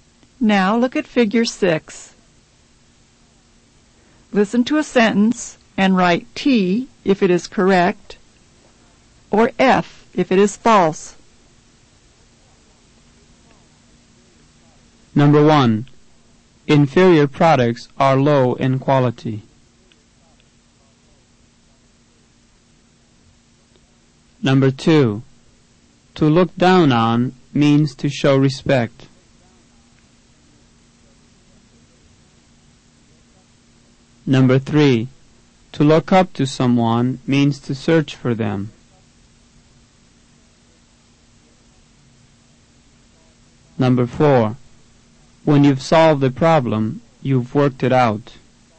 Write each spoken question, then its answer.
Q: To look up to someone means to search for them.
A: Number 3, to look up to someone means to search for them, is false.